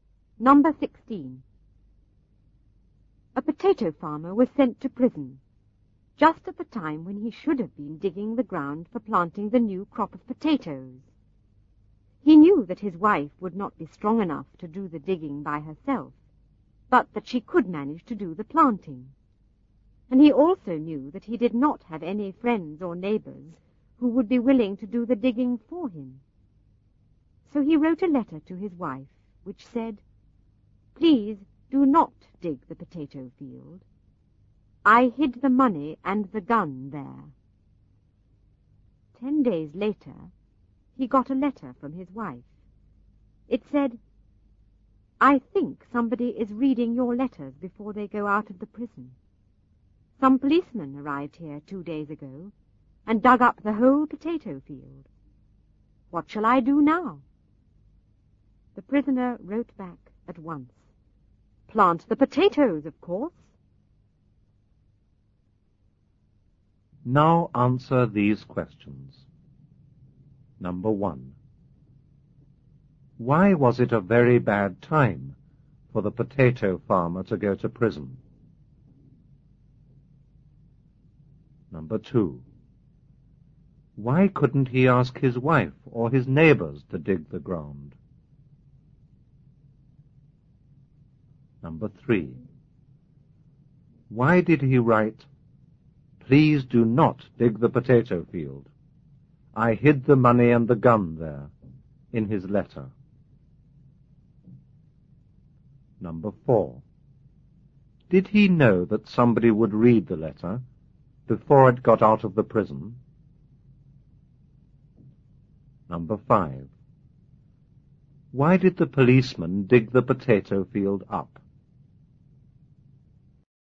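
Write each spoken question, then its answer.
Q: Why was it a very bad time for the potato farmer to go to prison?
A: It was the time when he should have been digging the ground for planting the new potato crop.

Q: Why couldn't he ask his wife or his neighbors to dig the ground?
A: His wife was not strong enough to do the digging, and no friends or neighbors would be willing to do it.

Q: Did he know that somebody would read the letter before it got out of the prison?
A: Yes

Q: Why did the policeman dig the potato field up?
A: To look for the money and the gun.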